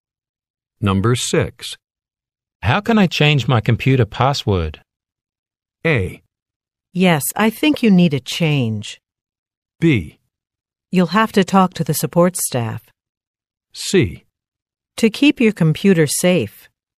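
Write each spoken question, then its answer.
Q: How can I change my computer password?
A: B: You'll have to talk to the support staff.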